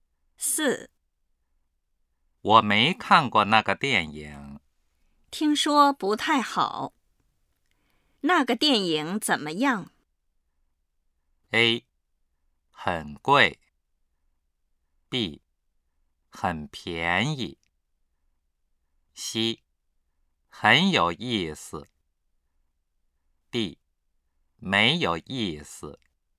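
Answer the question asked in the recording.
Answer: D: 没有意思。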